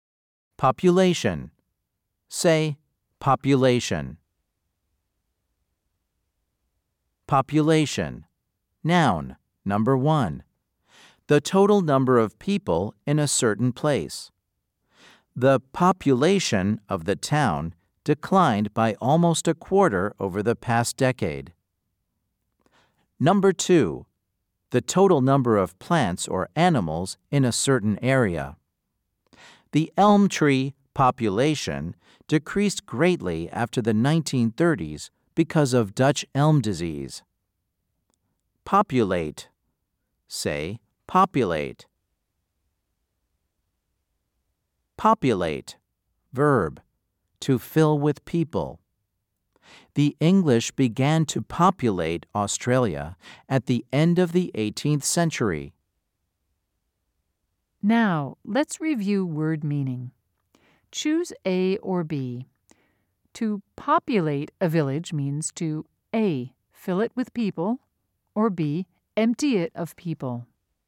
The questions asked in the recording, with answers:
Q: Choose A or B. To populate a village means to A.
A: If you said A, you are correct.